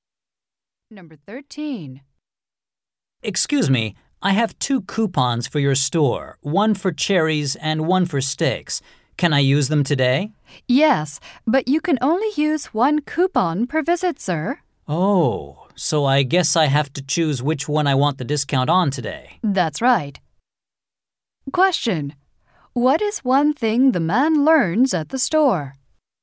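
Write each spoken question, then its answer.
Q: What is one thing the man learns at the store?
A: He can only use one coupon per visit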